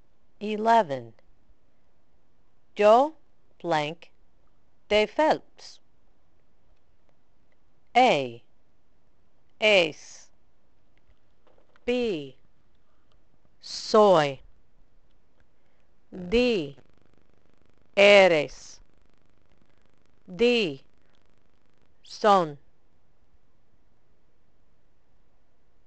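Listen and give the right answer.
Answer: B: Soy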